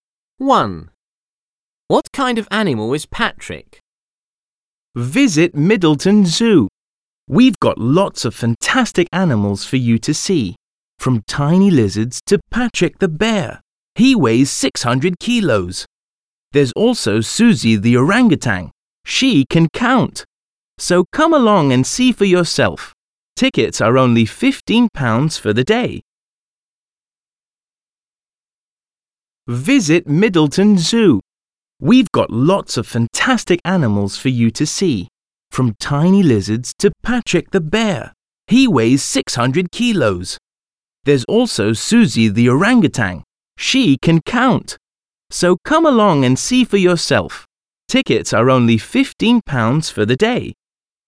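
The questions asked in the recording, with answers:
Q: What kind of animal is Patrick?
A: A bear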